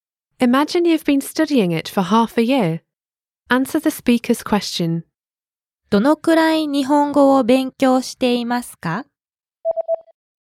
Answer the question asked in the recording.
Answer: 半年間です。